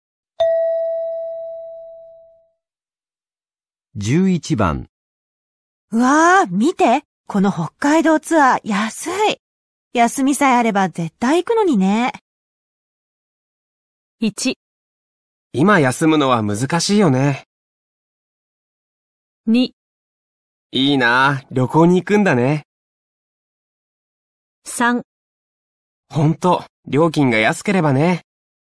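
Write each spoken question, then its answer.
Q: うわあ、見て!この北海道ツアー安い!休みさえあれば絶対行くのにね。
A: 1: 今休むのは難しいよね。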